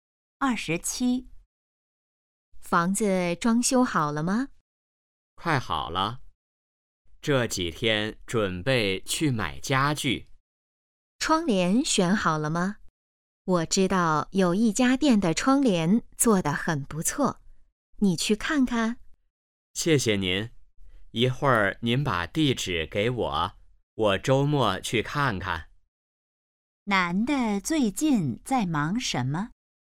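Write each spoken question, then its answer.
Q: 男的最近在忙什么?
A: 装修房子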